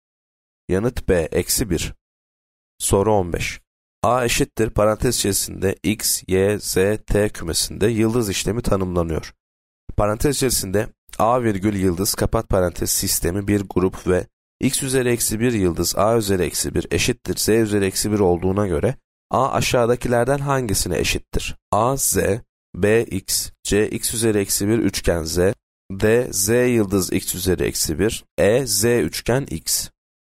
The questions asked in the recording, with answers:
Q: Parantez içerisinde A virgül yıldız kapat parantez sistemi bir grup ve X üzeri eksi 1 yıldız A üzeri eksi 1 eşittir Z üzeri eksi 1 olduğuna göre A aşağıdakilerden hangisine eşittir?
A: Yanıt D. Z yıldız x üzeri eksi 1.